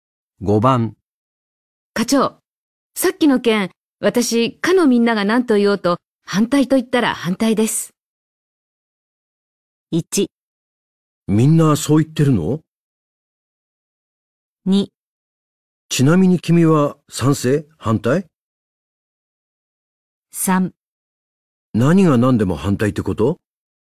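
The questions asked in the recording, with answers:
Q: 課長、さっきの件、私、かのみんなが何と言おうと、反対と言ったら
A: 3: 何が何でも反対ってこと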